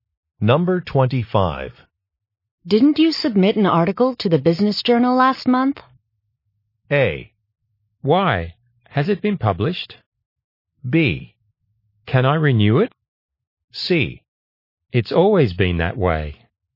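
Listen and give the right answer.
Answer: A: Why? Has it been published?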